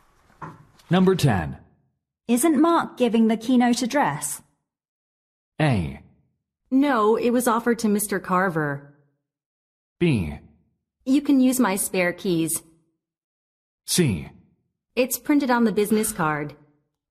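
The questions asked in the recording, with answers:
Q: Isn't Mark giving the keynote address?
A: A: No, it was offered to Mr. Carver.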